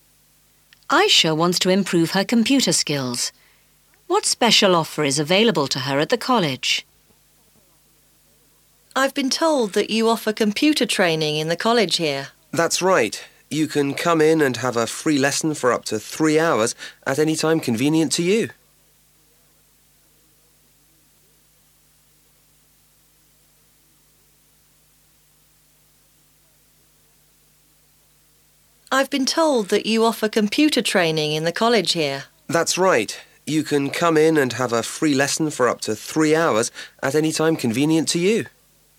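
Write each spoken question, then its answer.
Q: What special offer is available to her at the college?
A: A free lesson of up to 3 hours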